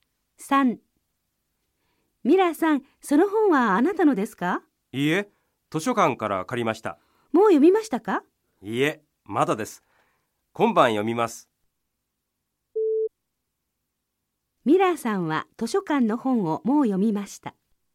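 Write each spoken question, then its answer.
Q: ミラーさんは図書館の本をもう読みました。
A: ×(まだ読んでいません)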